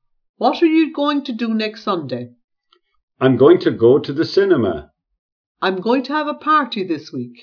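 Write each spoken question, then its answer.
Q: What are you going to do next Sunday?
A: I'm going to go to the cinema.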